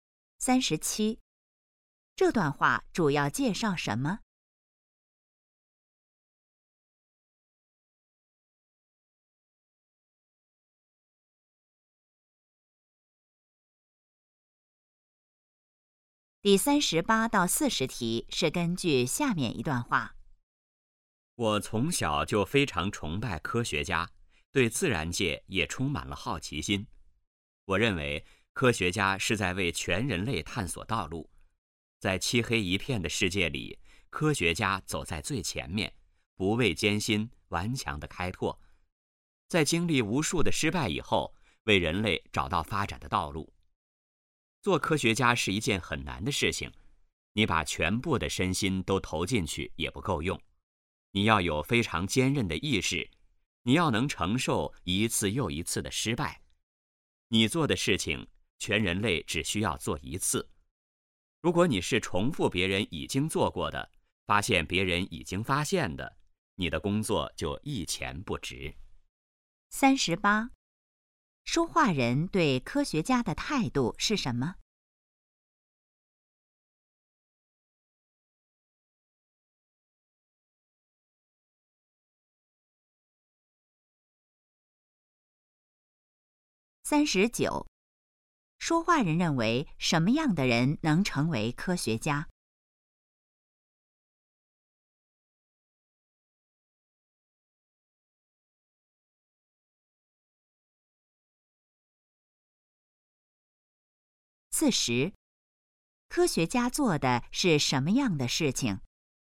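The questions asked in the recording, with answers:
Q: 说话人对科学家的态度是什么?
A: 崇拜

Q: 说话人认为什么样的人能成为科学家?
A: 意志坚韧、能承受一次次失败的人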